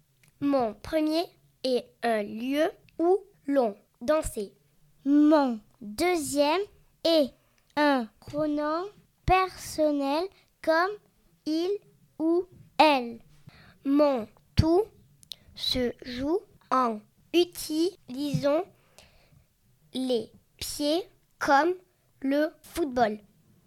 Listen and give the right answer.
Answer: Je suis un ballon.